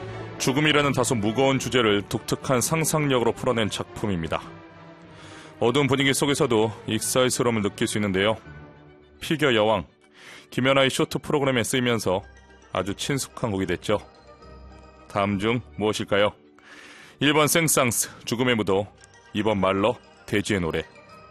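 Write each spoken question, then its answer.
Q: 다음 중 무엇일까요? 1번 생상스, 죽음의 무도, 2번 말러, 돼지의 노래.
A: 1: 생상스, 죽음의 무도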